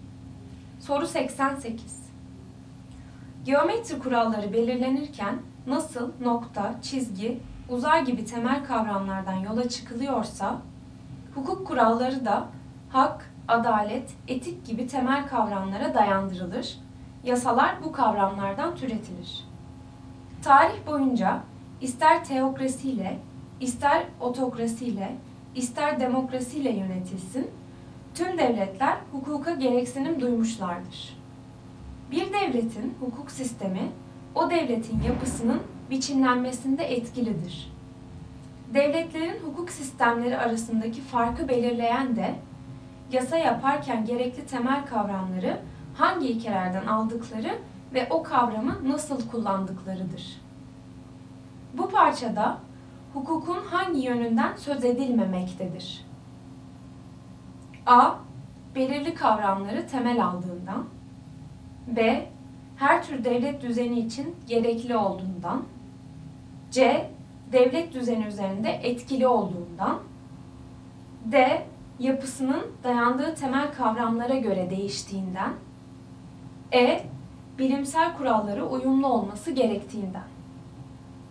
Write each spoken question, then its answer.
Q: Bu parçada hukukun hangi yönünden söz edilmemektedir?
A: Doğru cevap E. Bilimsel kurallara uyumlu olması gerektiğinden.